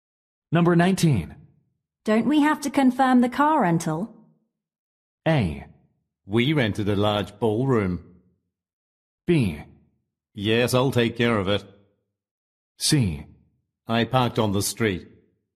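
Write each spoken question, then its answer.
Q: Don't we have to confirm the car rental?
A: B: Yes, I'll take care of it.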